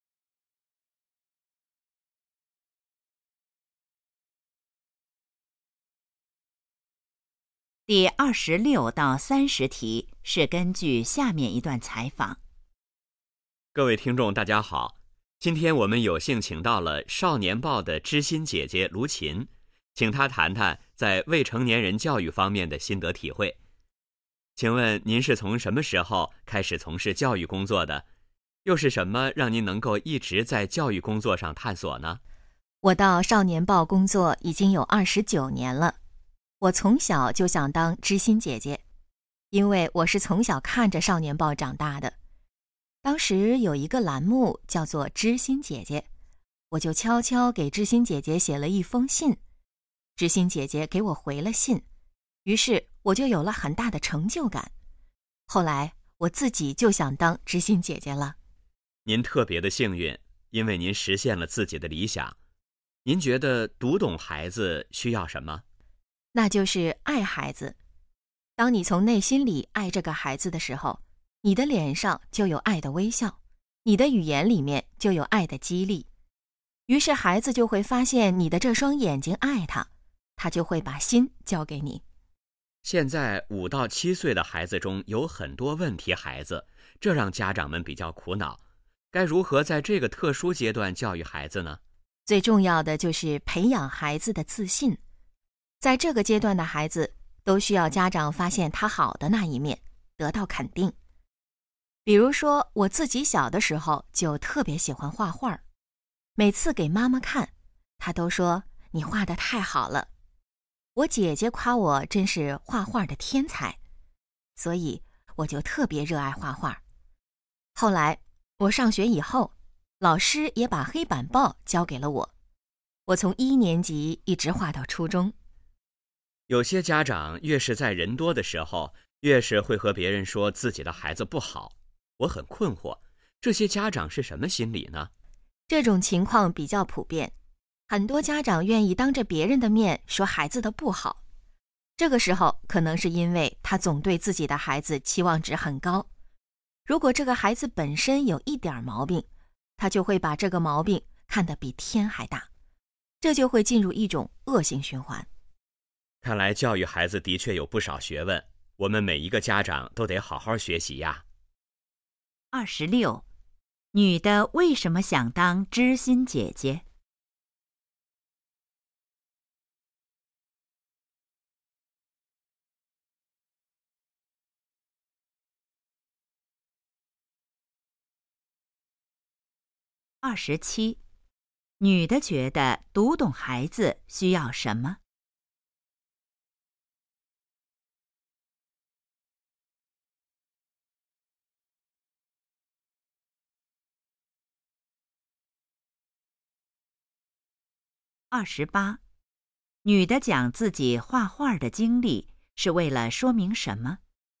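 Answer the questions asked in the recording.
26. 小时候给知心姐姐写信得到回信,有很大成就感
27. 爱孩子
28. 要培养孩子的自信,肯定孩子
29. 对孩子期望值太高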